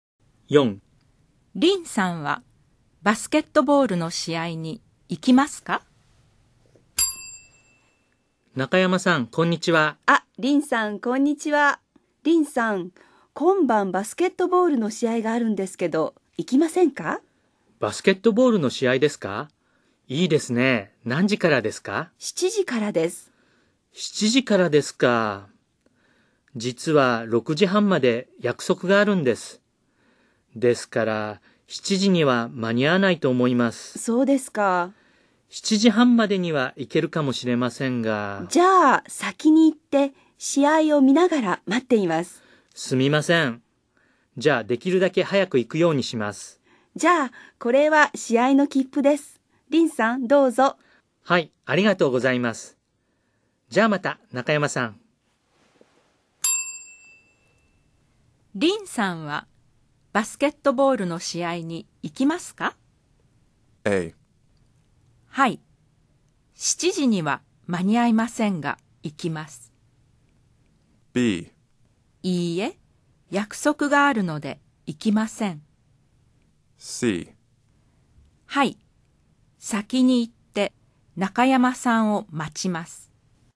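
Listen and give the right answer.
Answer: A: はい。7時には間に合いませんが、行きます。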